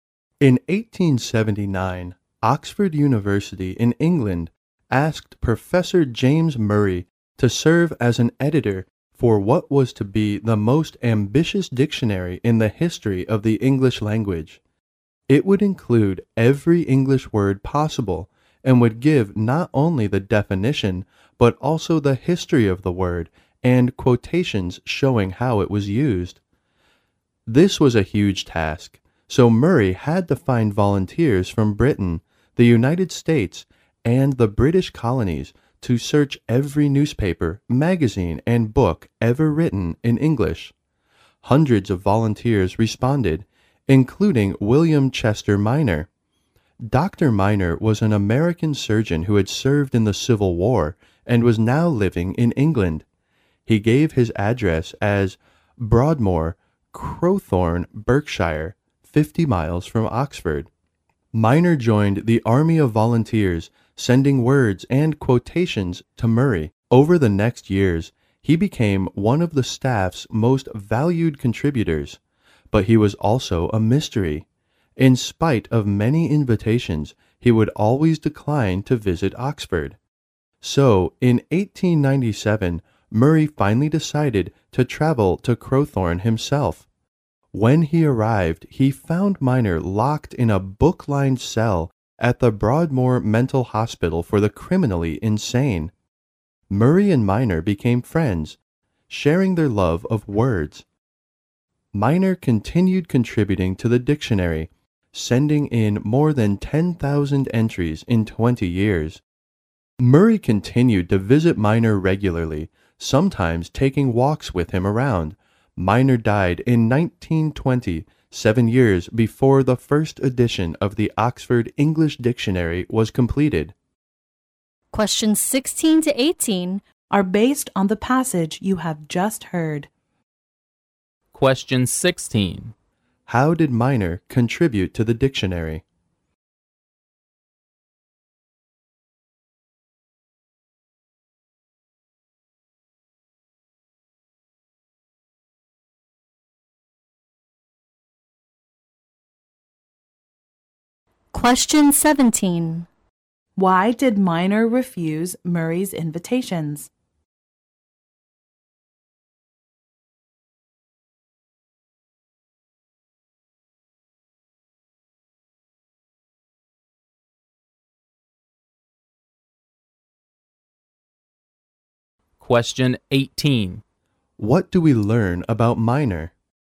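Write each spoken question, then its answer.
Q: How did Minor contribute to the dictionary?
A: He sent in words and quotations, more than 10,000 entries.

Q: Why did Minor refuse Murray's invitations?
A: He was locked up in a mental hospital for the criminally insane.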